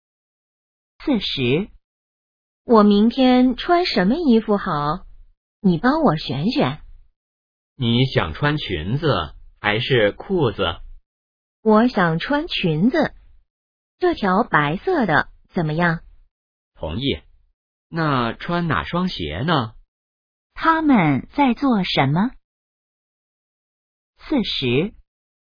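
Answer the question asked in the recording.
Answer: 选衣服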